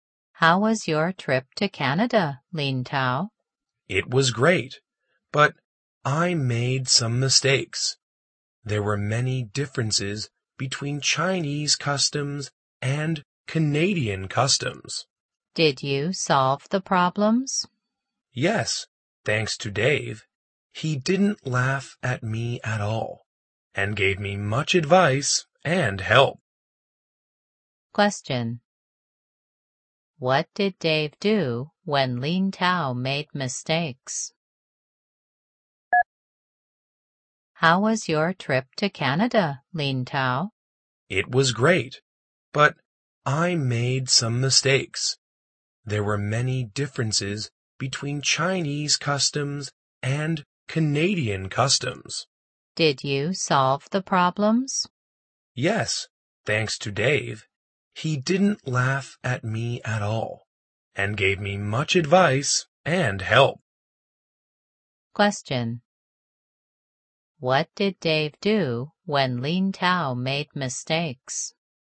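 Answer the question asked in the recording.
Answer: He gave him advice and help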